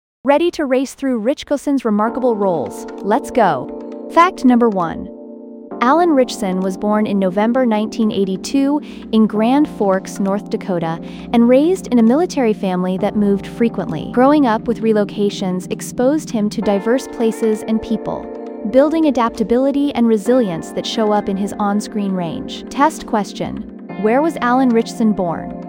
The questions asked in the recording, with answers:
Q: where was Alan Ritchison born?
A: Grand Forks, North Dakota.